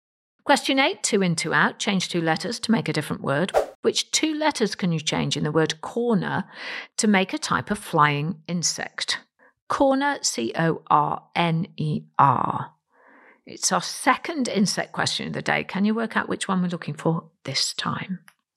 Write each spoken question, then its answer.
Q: Which two letters can you change in the word corner to make a type of flying insect?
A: Well, change the letter C for an H and change the second letter R and put in a T and you get the word hornet, H-O-R-N-E-T, a flying insect.